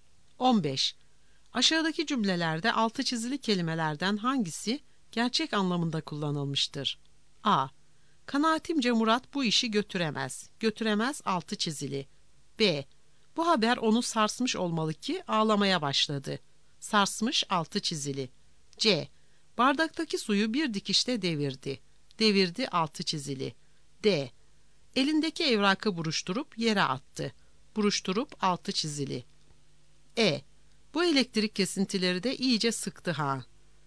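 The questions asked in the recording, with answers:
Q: Aşağıdaki cümlelerde altı çizili kelimelerden hangisi gerçek anlamında kullanılmıştır?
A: D: Elindeki evrakı buruşturup yere attı.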